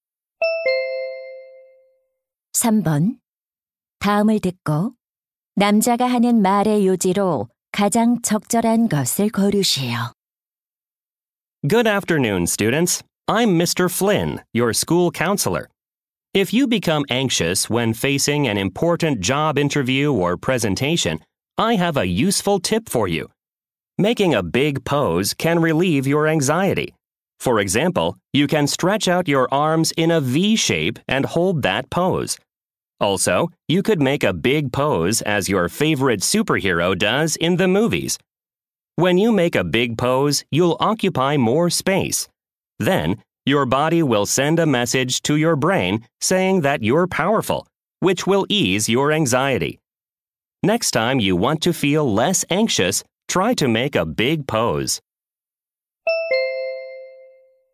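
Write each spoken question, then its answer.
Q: 다음을 듣고 남자가 하는 말의 요지로 가장 적절한 것을 고르시오.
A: 큰 자세를 취하면 불안을 줄일 수 있다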